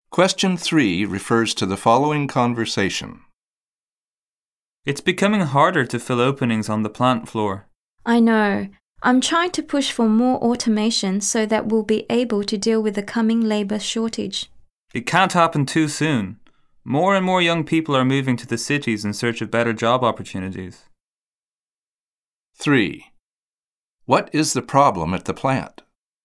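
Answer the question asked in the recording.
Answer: It is hard to fill job openings (a labour shortage).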